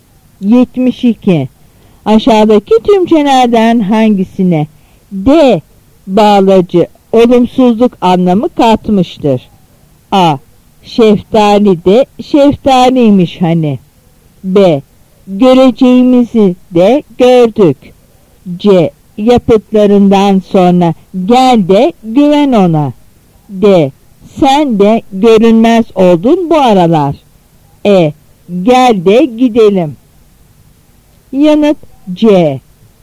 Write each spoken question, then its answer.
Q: Aşağıdaki tümçelerden hangisine D bağlacı olumsuzluk anlamı katmıştır?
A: Yanıt C.